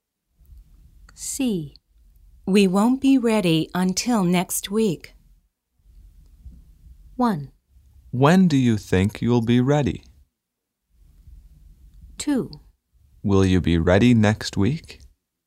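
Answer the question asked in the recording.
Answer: 1: When do you think you'll be ready?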